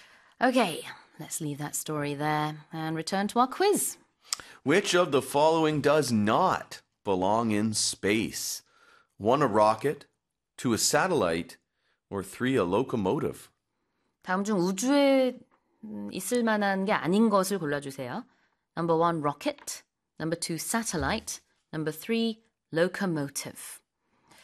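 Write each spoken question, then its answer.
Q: Which of the following does not belong in space?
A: 3: a locomotive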